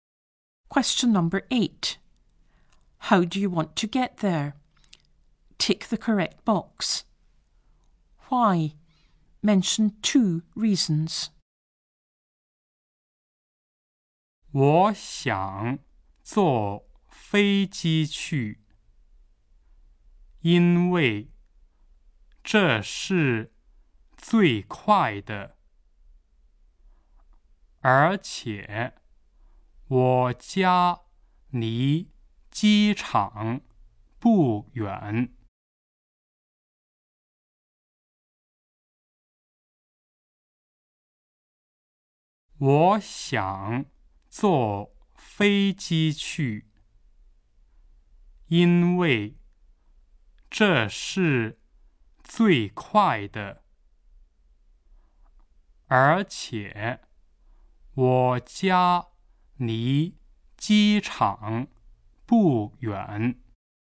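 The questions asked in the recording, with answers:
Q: How do you want to get there?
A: By plane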